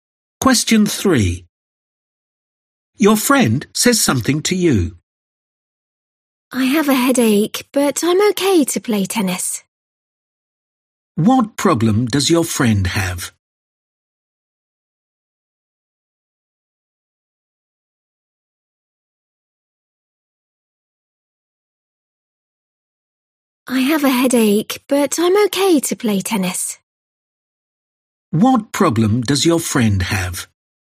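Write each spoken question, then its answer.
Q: What problem does your friend have?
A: a headache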